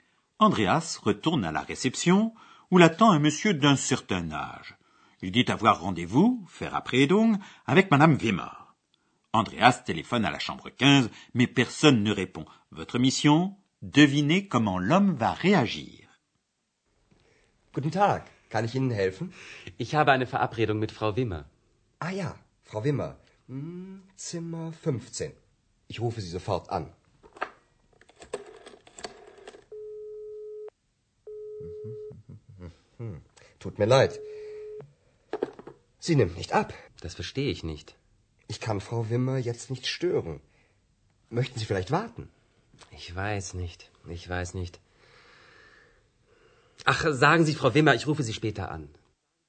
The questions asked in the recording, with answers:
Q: Devinez comment l'homme va réagir.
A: Le monsieur fait savoir Madame Wimmer qu'il l'appellera plus tard.